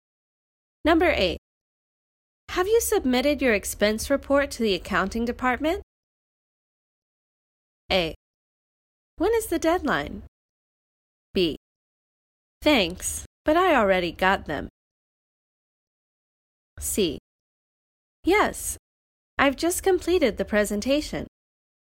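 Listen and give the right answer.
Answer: A: When is the deadline?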